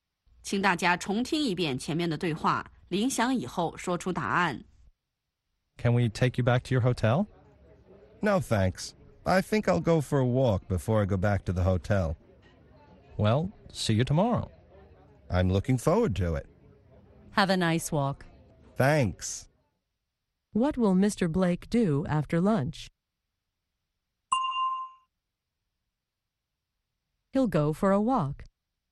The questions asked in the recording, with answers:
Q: What will Mr. Blake do after lunch?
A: He'll go for a walk.